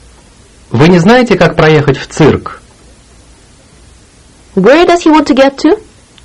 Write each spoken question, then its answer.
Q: Where does he want to get to?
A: В цирк. To the circus.